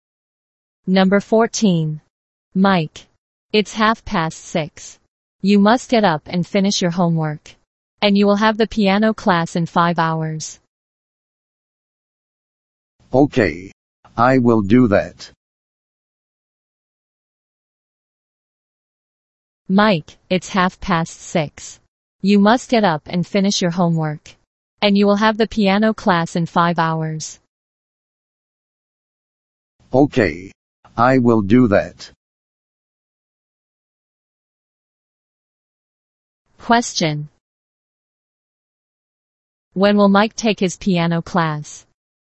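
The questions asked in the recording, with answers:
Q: When will Mike take his piano class?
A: At 11:30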